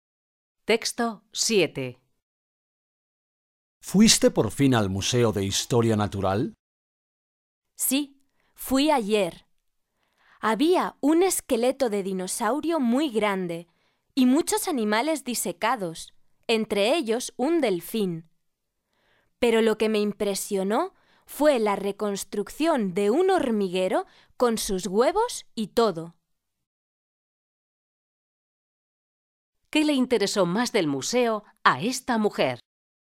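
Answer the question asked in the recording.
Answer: La reconstrucción de un hormiguero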